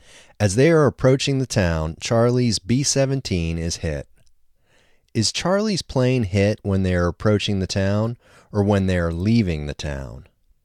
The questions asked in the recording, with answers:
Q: Is Charlie's plane hit when they are approaching the town or when they are leaving the town?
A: Charlie's plane is hit when they are approaching the town.